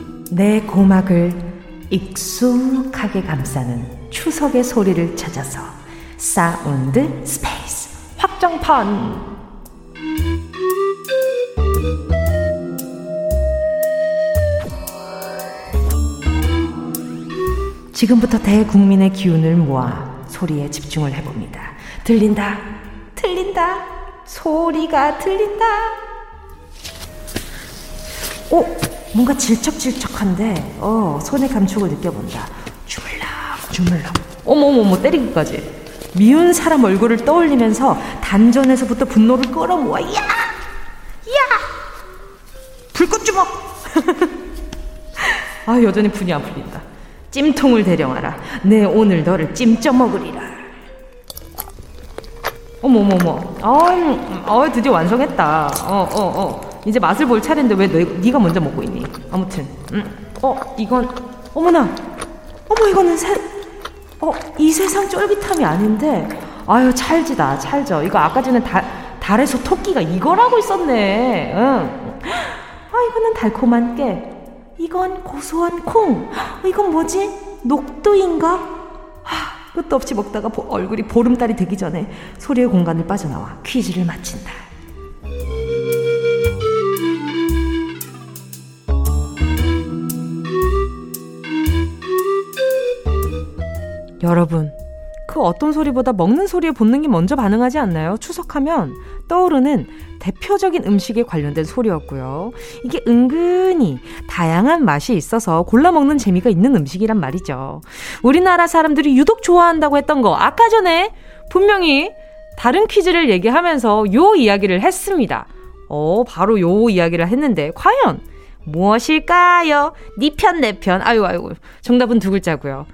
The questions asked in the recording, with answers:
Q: 어, 바로 요 이야기를 했는데 과연 무엇일까요?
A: 예, 이 소리는 바로 송편이었습니다.